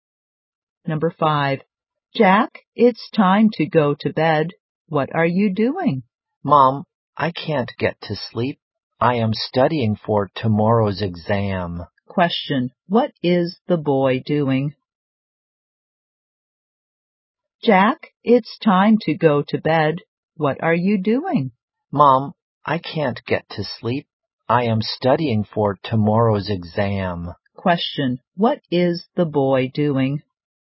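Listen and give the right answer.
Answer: Studying for tomorrow's exam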